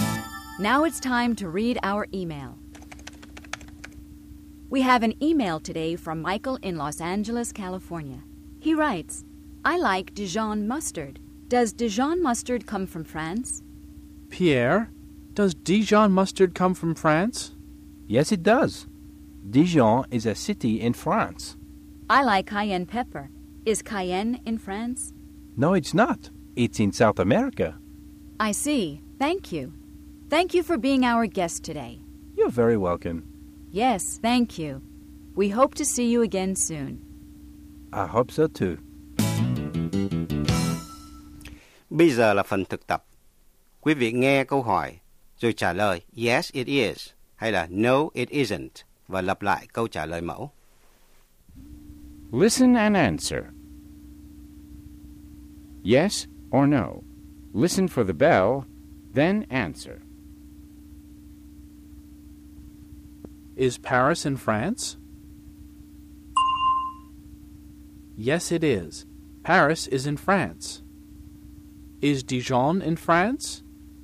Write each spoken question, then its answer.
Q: Is Dijon in France?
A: Yes, it is. Dijon is in France.